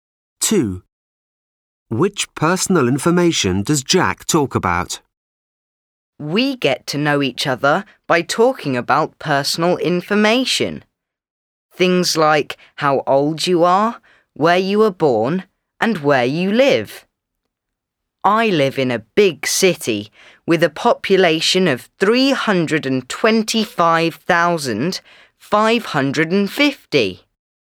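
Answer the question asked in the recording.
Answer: age, where you were born and where you live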